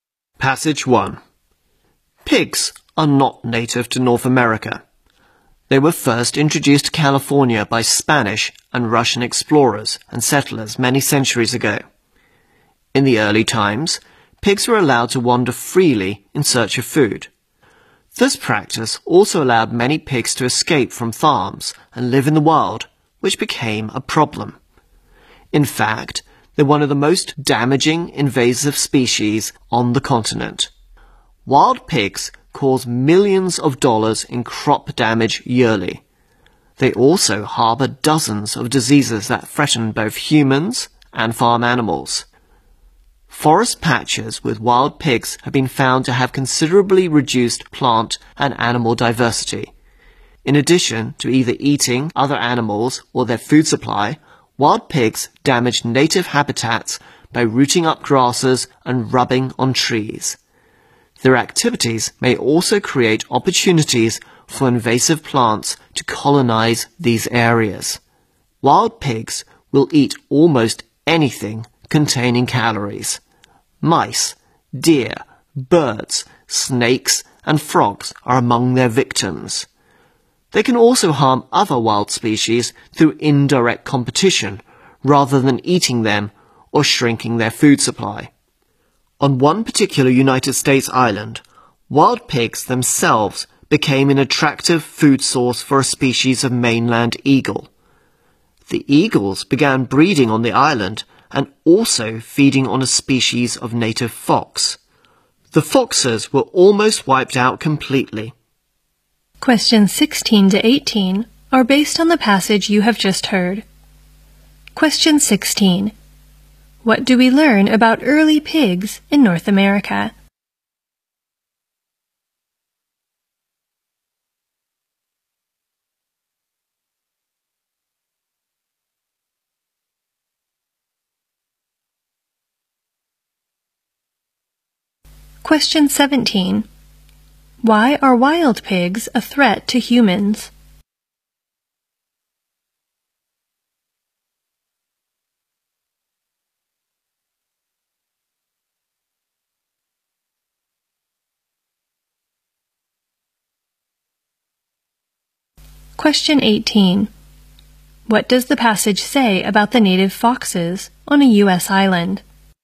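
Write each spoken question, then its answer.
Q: What do we learn about early pigs in North America?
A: They were allowed to wander freely in search of food

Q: Why are wild pigs a threat to humans?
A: They harbor diseases

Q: What does the passage say about the native foxes on a U.S.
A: They were almost wiped out by eagles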